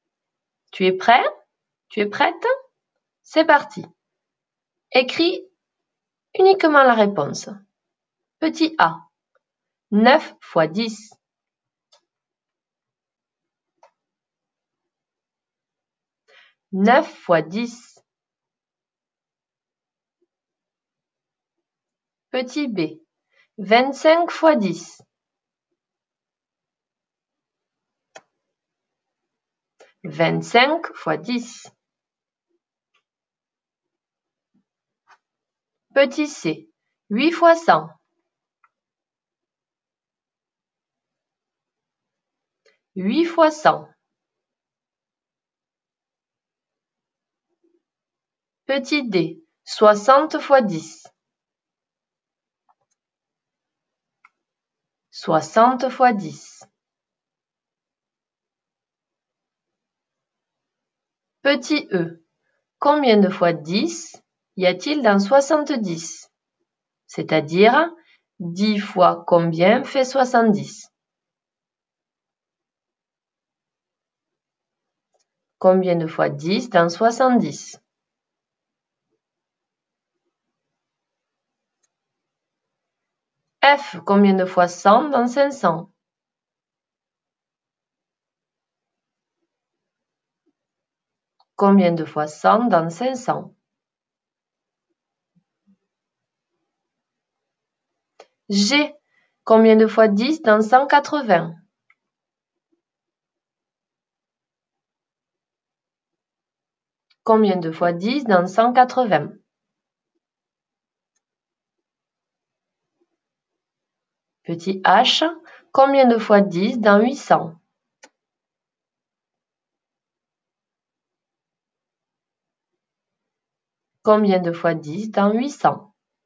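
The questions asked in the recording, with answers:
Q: Petit a, 9 fois 10.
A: 90

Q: Petit b, 25 fois 10.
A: 250

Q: Petit c, 8 fois 100.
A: 800

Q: Petit d, 60 fois 10.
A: 600

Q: G, combien de fois 10 dans 180?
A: 18

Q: Petit h, combien de fois 10 dans 800?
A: 80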